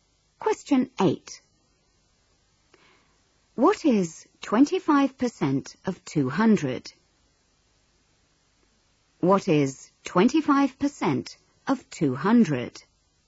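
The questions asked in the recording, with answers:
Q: What is 25% of 200?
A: 50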